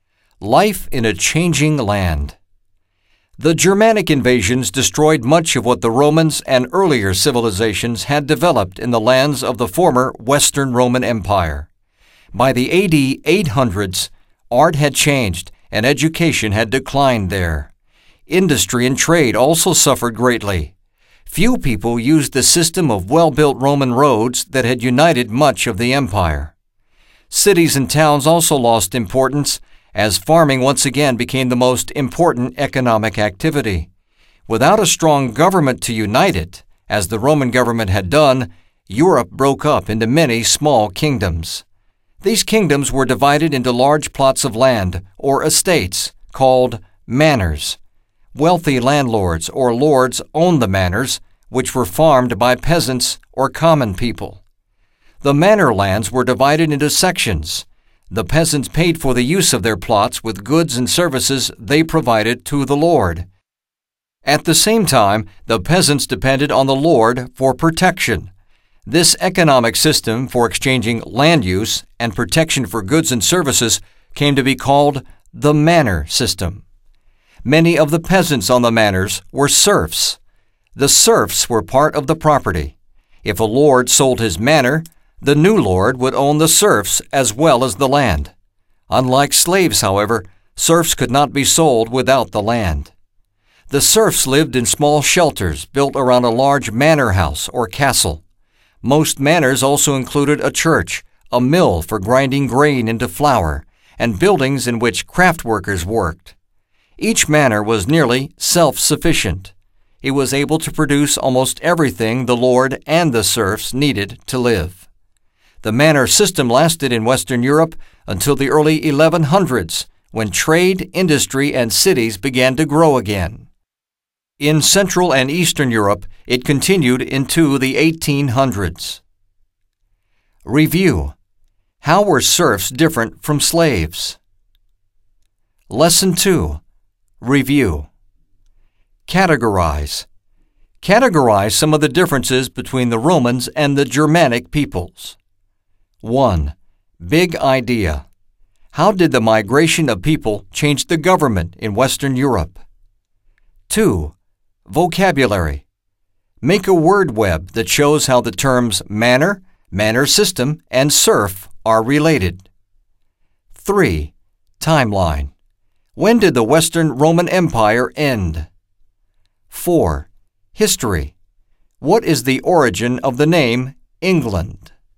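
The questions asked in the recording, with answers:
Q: How were serfs different from slaves?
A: Serfs could not be sold without the land

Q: What is the origin of the name England?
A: Anglo-Saxon words meaning land of the Angles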